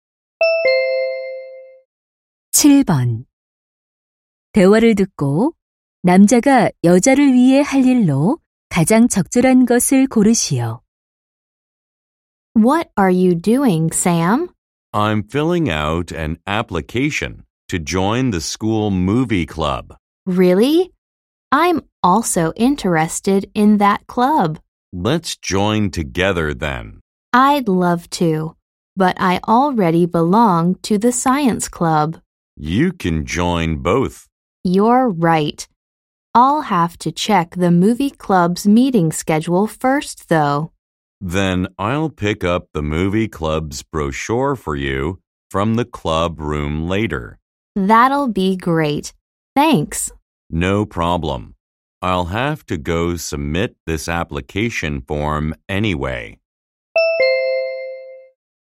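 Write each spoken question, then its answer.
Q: 대화를 듣고 남자가 여자를 위해 할 일로 가장 적절한 것을 고르시오.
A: 영화 동아리 안내 책자 가져다주기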